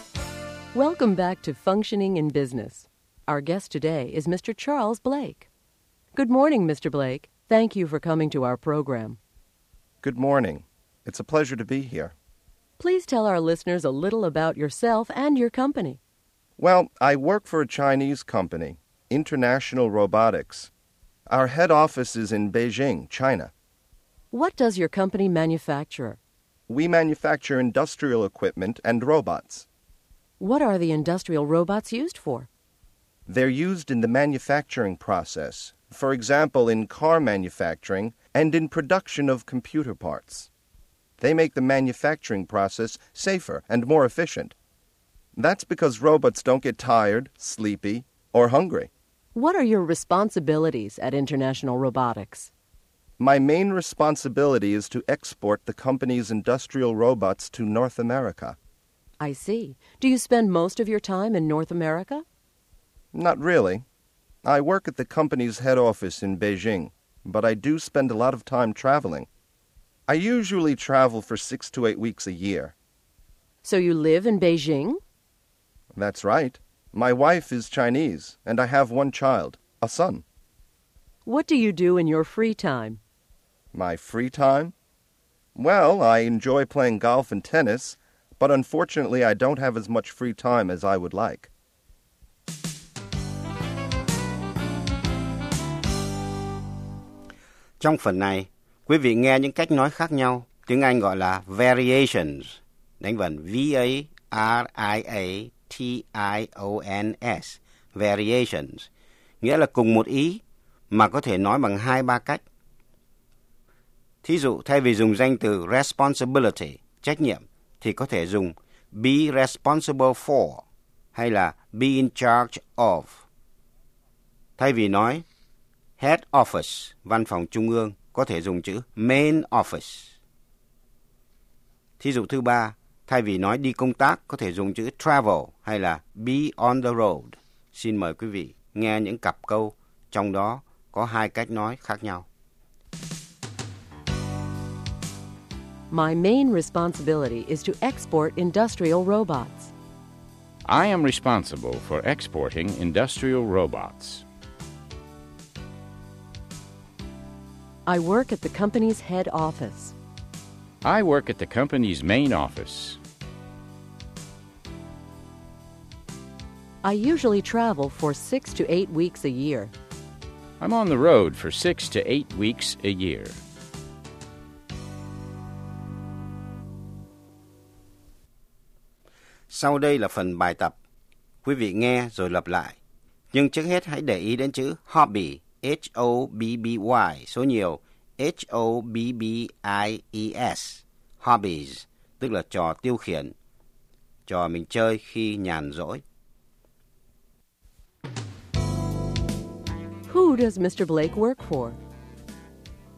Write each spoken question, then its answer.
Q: Who does Mr. Blake work for?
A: He works for International Robotics, a Chinese company.